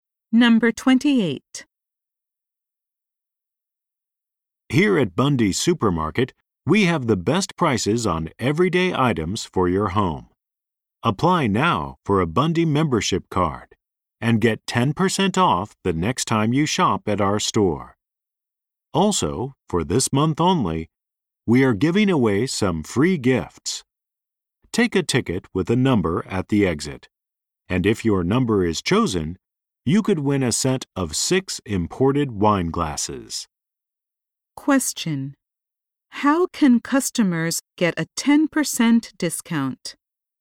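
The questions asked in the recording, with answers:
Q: How can customers get a 10% discount?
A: By applying for a Bundy membership card.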